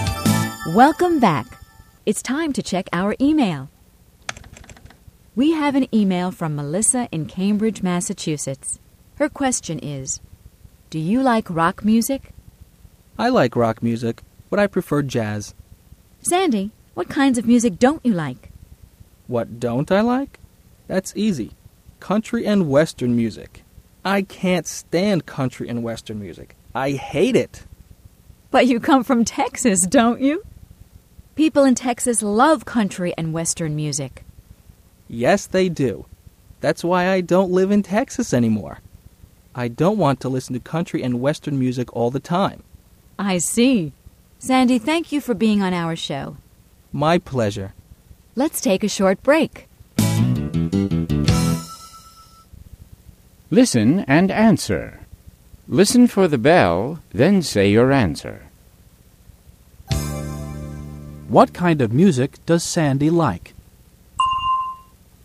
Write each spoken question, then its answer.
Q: What kind of music does Sandy like?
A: He likes jazz and rock.